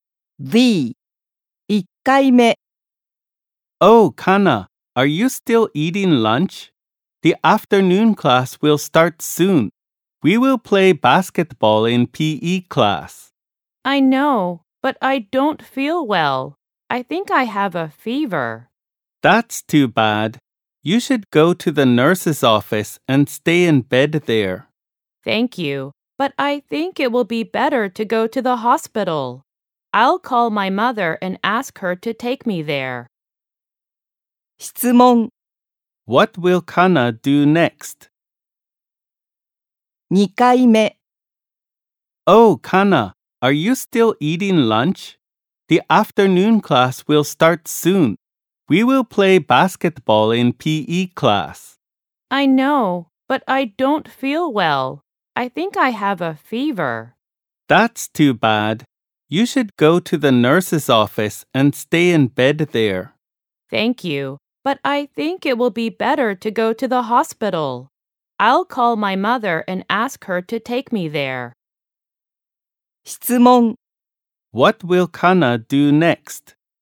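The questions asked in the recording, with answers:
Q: What will Kana do next?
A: Call her mother and ask her to take her to the hospital.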